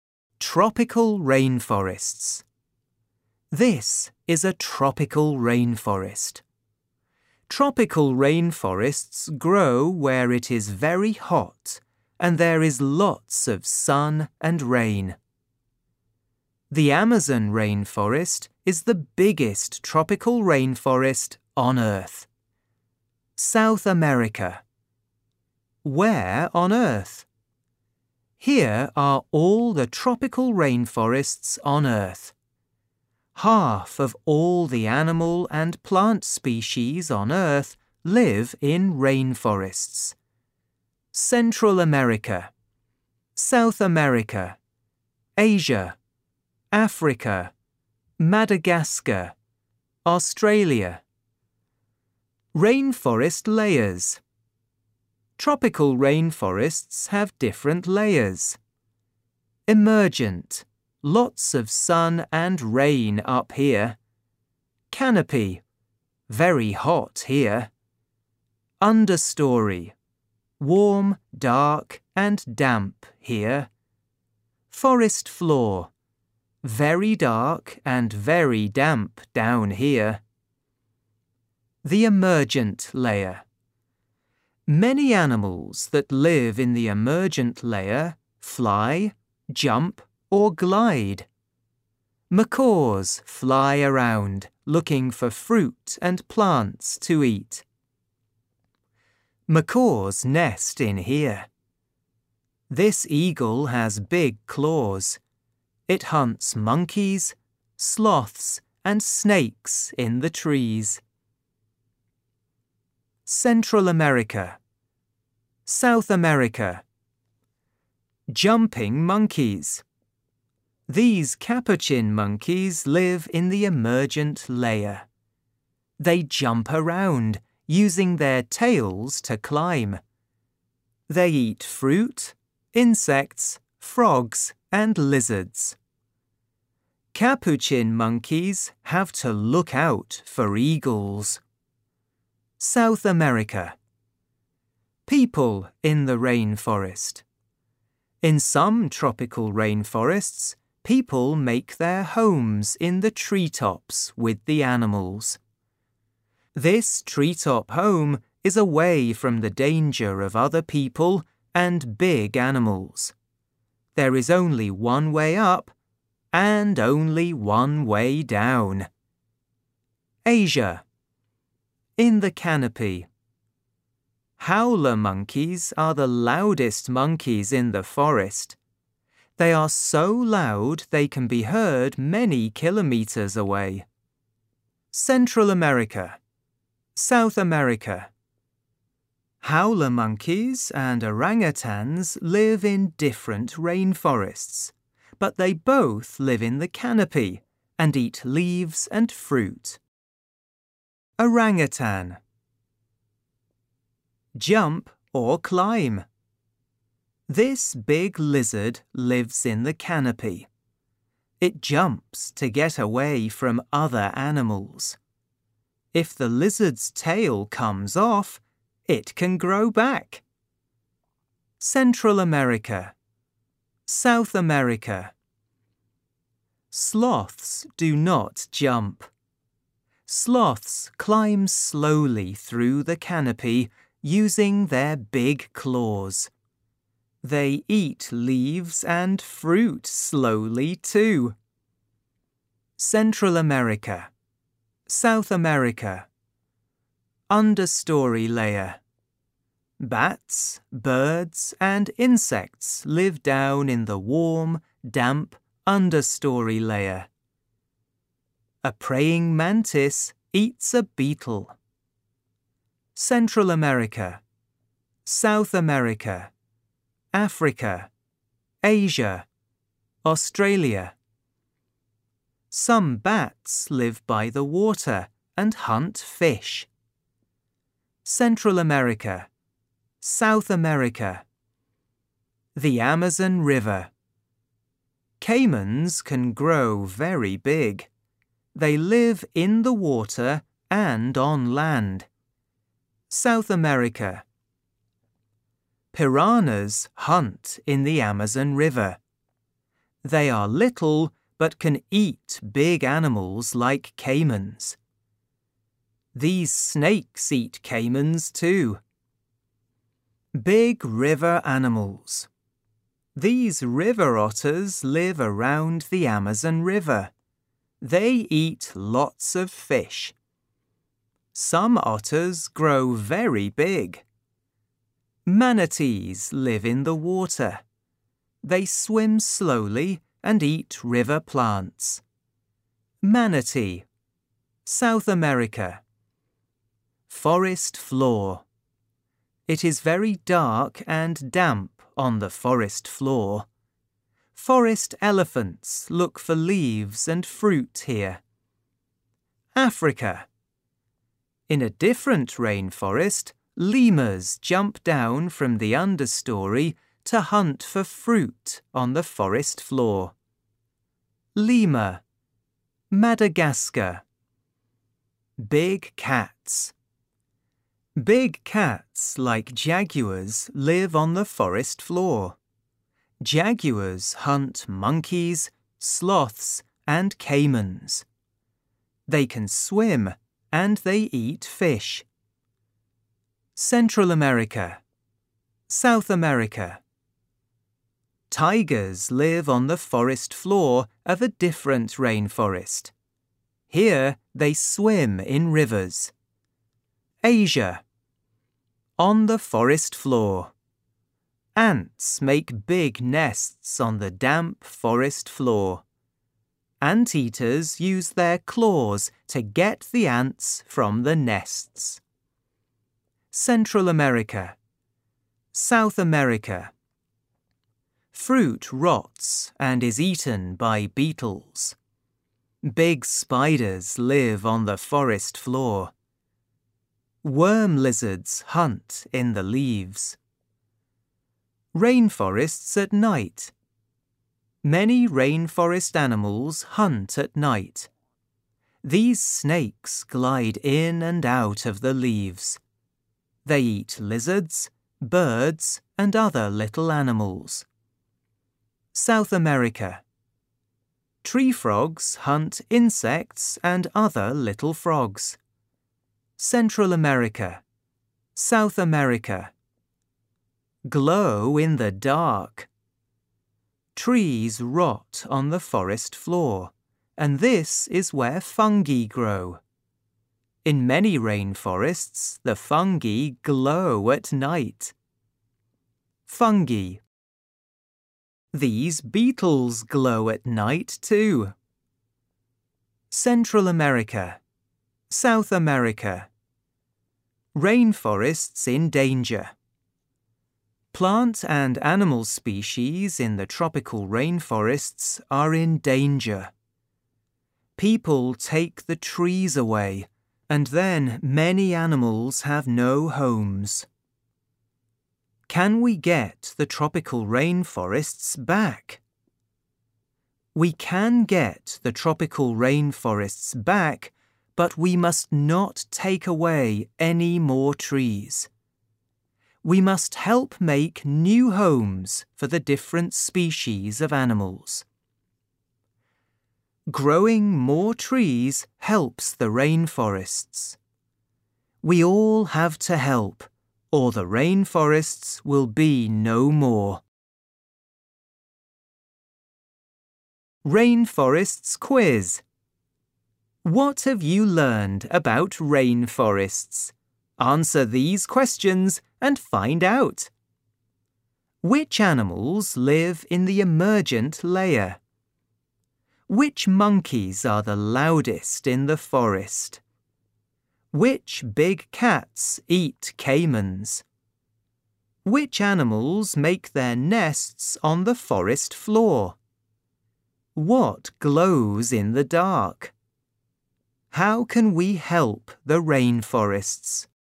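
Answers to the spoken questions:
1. Macaws, eagles and capuchin monkeys
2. Howler monkeys
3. Jaguars
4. Ants
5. Fungi and some beetles
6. Stop taking away trees, grow more trees and make new homes for animals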